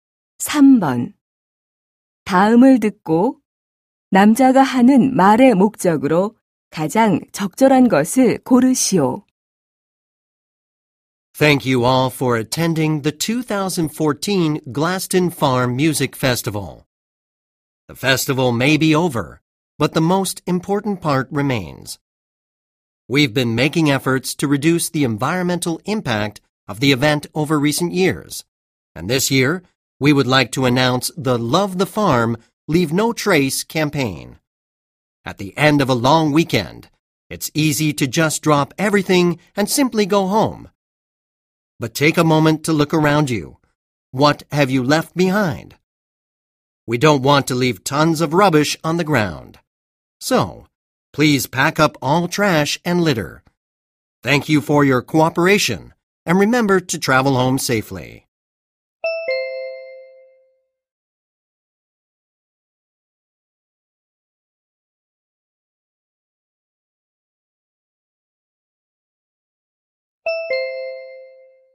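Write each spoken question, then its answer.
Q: 다음을 듣고 남자가 하는 말의 목적으로 가장 적절한 것을 고르시오.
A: 축제 후 쓰레기를 모두 챙겨 가도록 요청하려고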